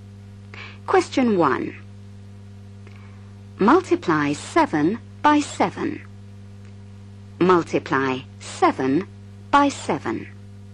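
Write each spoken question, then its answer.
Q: Multiply 7 by 7.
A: 49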